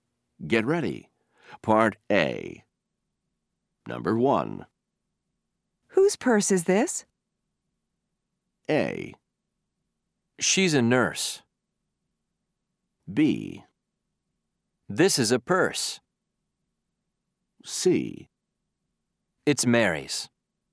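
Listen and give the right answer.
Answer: C: It's Mary's.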